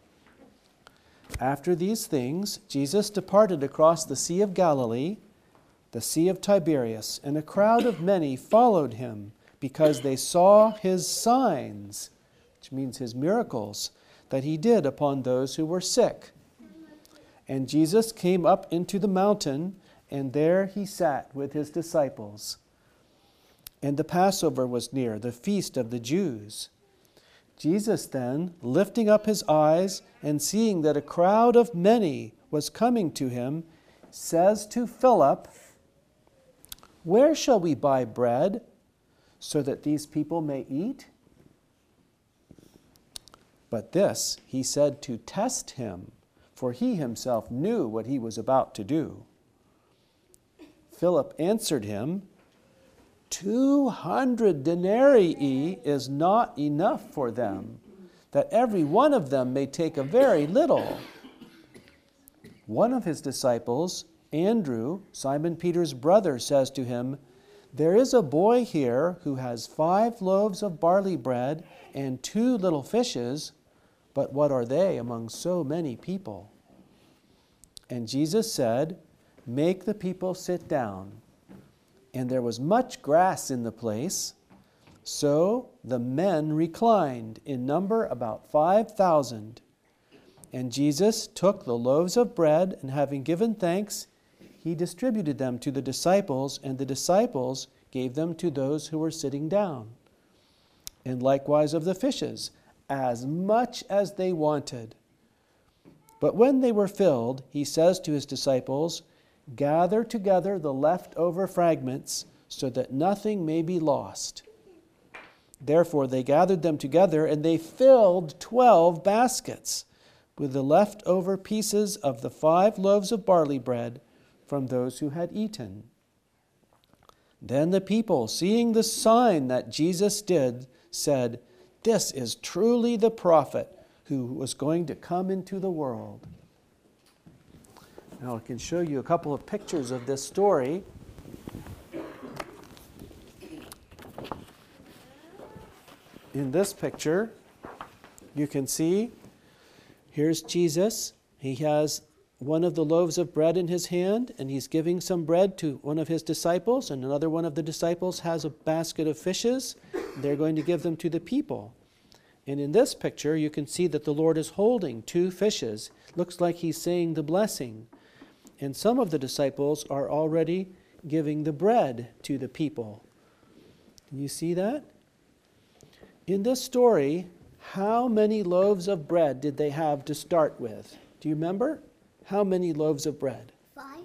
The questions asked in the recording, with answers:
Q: In this story, how many loaves of bread did they have to start with?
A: Five.